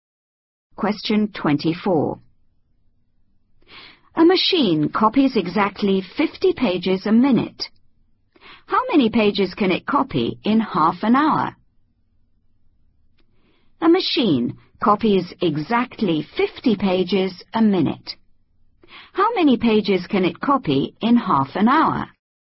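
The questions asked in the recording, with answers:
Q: How many pages can it copy in half an hour?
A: 1500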